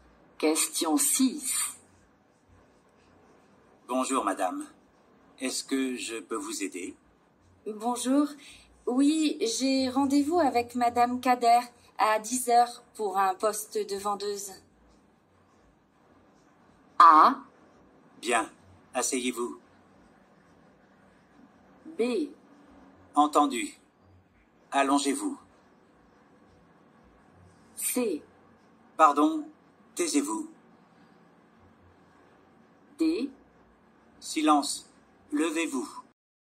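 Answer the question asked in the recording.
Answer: A: Bien, asseyez-vous.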